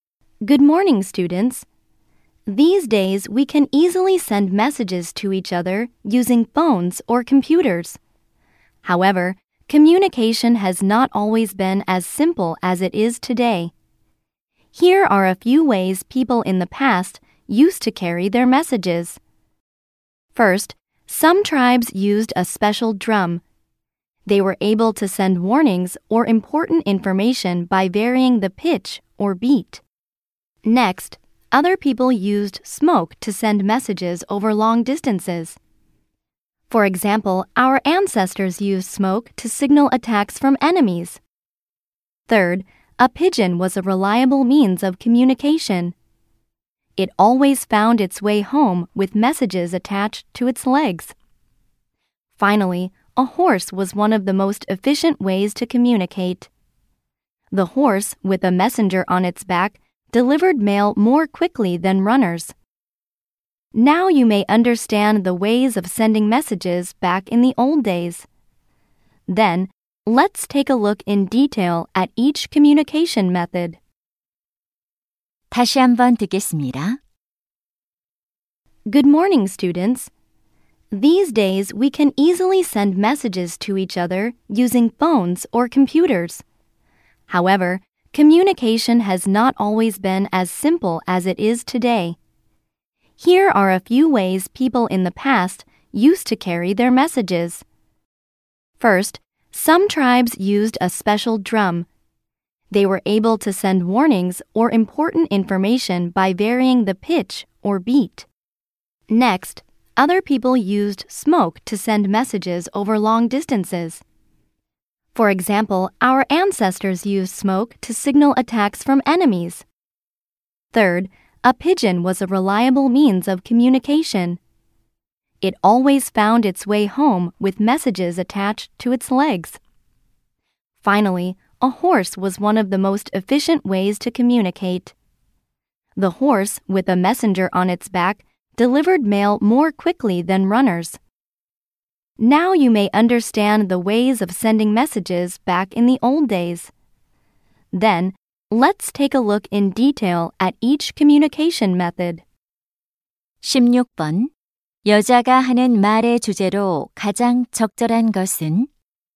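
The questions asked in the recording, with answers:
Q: 여자가 하는 말의 주제로 가장 적절한 것은?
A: 과거에 사람들이 메시지를 전달하던 방법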